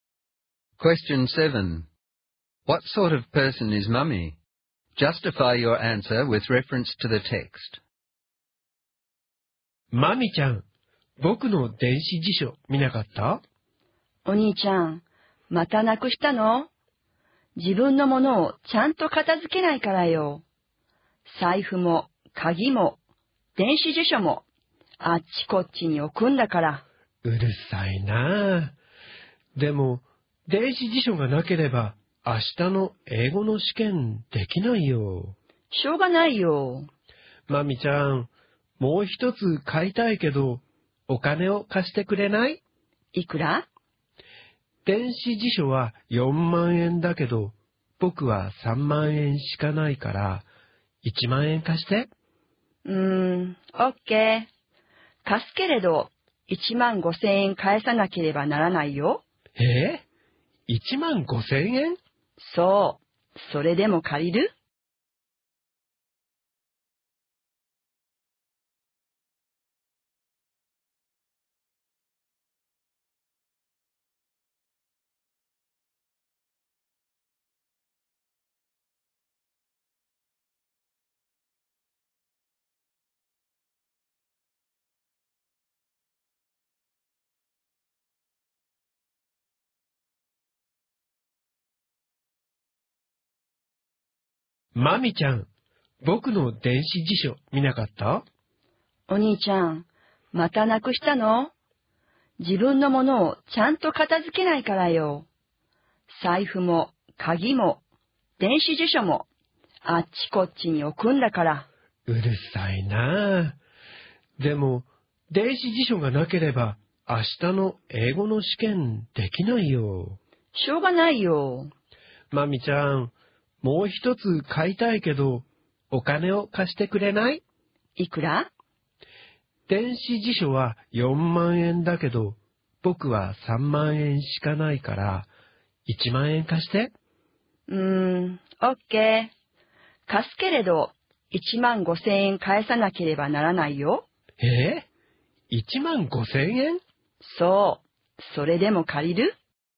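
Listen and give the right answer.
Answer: Mami is critical and shrewd or opportunistic: she scolds her brother for being untidy and will lend him 10,000 yen only if he pays back 15,000 yen.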